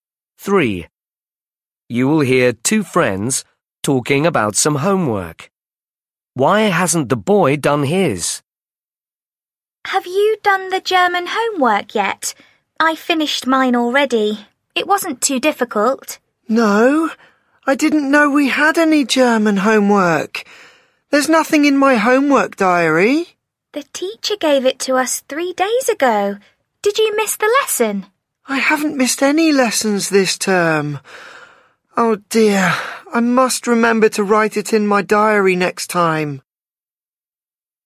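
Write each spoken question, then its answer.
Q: Why hasn't the boy done his?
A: He didn't write it in his homework diary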